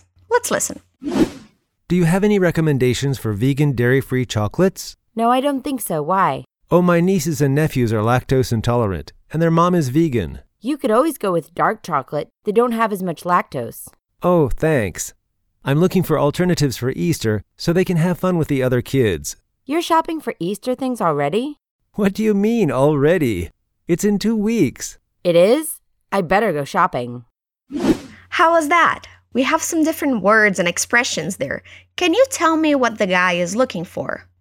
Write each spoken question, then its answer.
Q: Can you tell me what the guy is looking for?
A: Oh, the guy is looking for recommendations for chocolates.